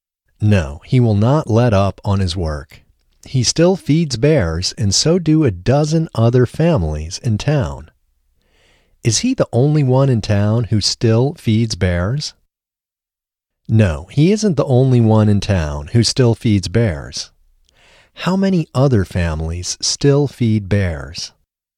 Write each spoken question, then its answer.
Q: How many other families still feed bears?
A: A dozen other families still feed bears.